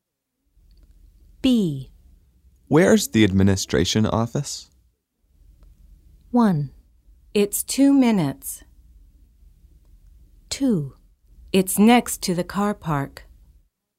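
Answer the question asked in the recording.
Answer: 2: It's next to the car park.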